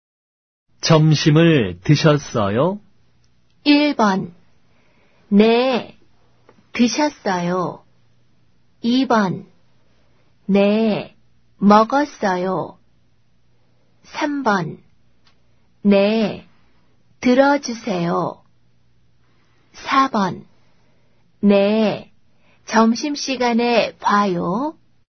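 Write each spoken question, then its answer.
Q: 점심을 드셨어요?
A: 2: 네, 먹었어요.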